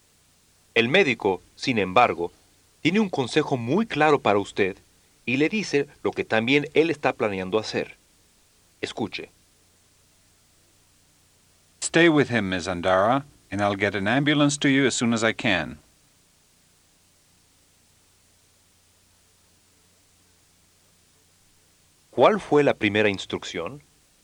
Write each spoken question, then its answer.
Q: ¿Cuál fue la primera instrucción?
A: Stay with him, Ms. Andara.